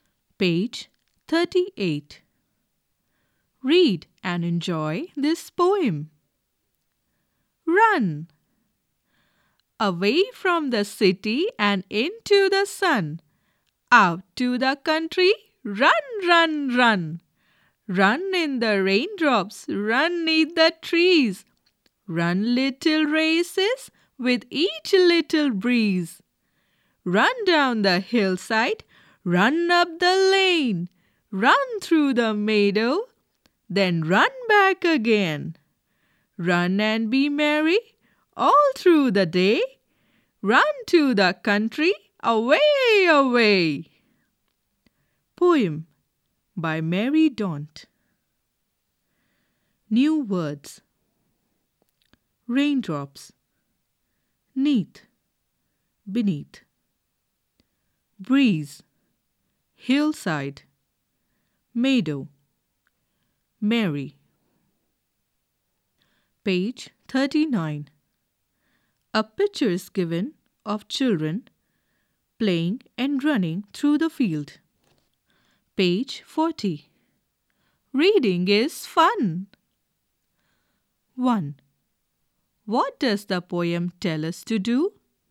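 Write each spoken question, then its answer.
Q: What does the poem tell us to do?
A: To run away from the city to the country and be merry all day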